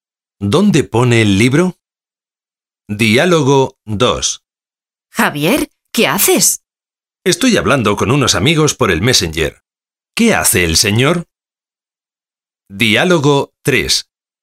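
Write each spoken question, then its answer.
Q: ¿Qué hace el señor?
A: Habla con unos amigos por el Messenger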